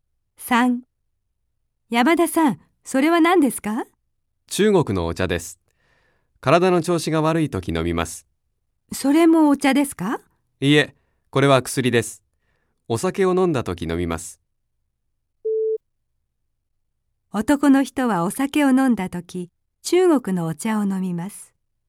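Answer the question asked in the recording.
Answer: ×(薬を飲む)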